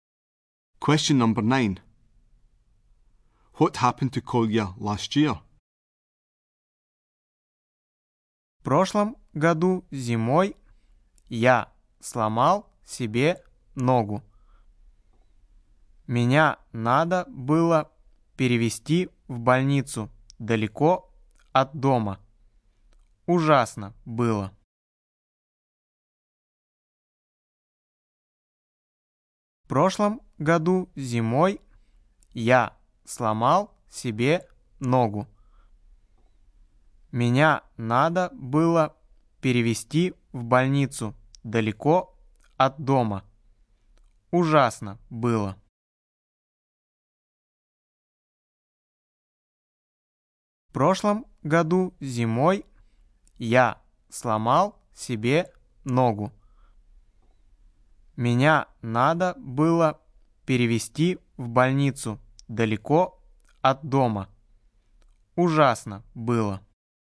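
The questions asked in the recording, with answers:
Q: What happened to Kolya last year?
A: He broke his leg and had to go to a hospital far from home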